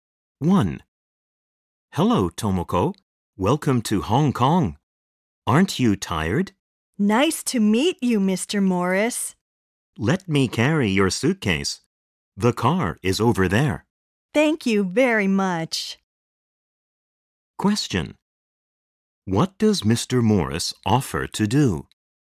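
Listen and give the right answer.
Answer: Carry Tomoko's suitcase.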